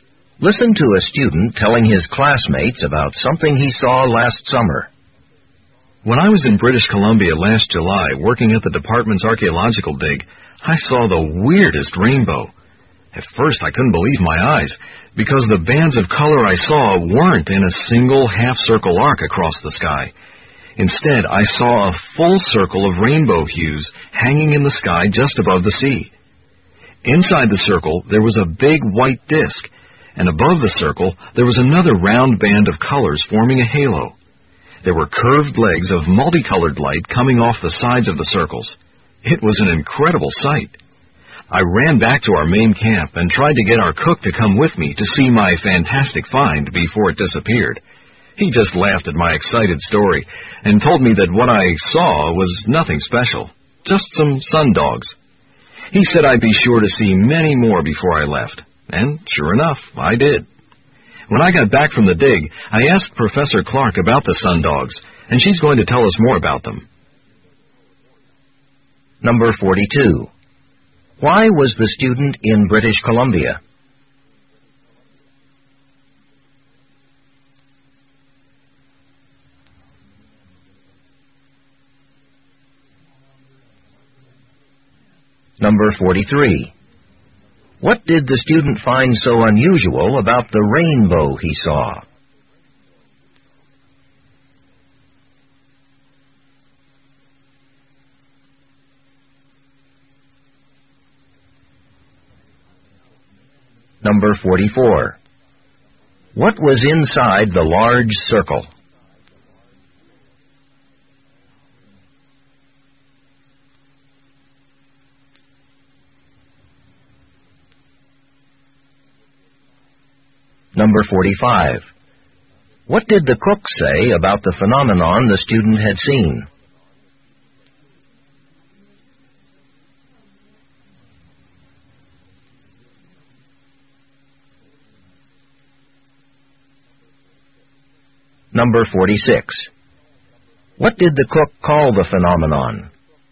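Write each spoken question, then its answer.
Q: Why was the student in British Columbia?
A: He was working at the department's archaeological dig.

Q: What did the student find so unusual about the rainbow he saw?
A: It was a full circle instead of a half-circle arc.

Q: What was inside the large circle?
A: A big white disc.

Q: What did the cook say about the phenomenon the student had seen?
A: It was nothing special, and he would see many more.

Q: What did the cook call the phenomenon?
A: Sun dogs.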